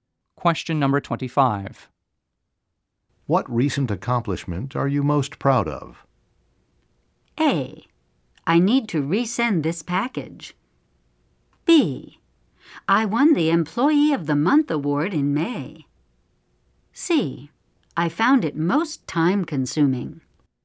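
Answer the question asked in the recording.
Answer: B: I won the Employee of the Month award in May.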